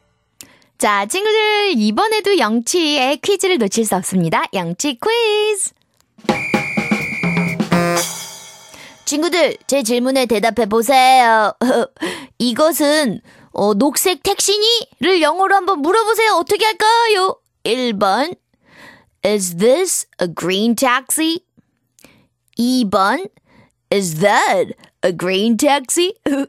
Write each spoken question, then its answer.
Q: 이것은 어, 녹색 택시니?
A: Is this a green taxi? Is this?